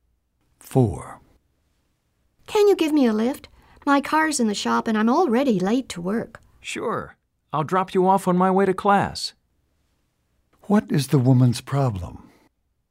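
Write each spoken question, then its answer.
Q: What is the woman's problem?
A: Her car is in the shop and she is late for work.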